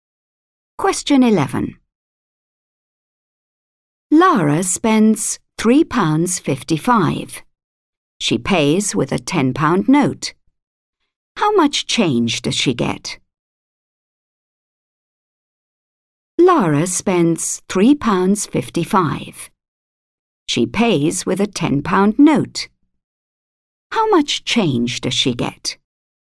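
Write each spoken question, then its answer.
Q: How much change does she get?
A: £6.45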